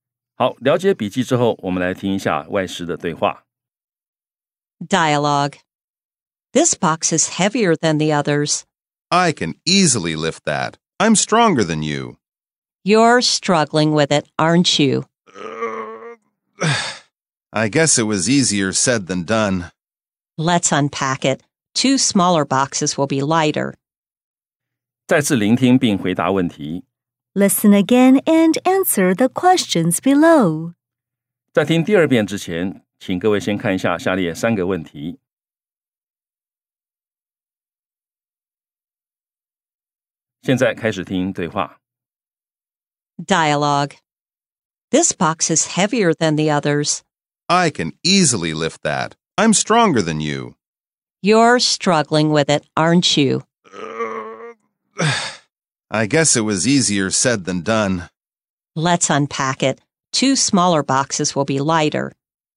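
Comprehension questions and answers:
再次聆聽並回答問題 Listen again and answer the questions below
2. Can the man lift the box by himself?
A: No, he struggles with it.

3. What does the woman suggest?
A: Unpacking the box into two smaller boxes.

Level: 中階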